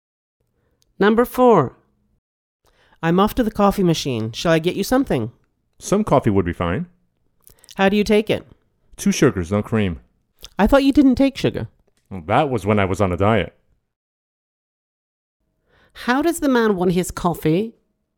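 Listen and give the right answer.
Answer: Two sugars, no cream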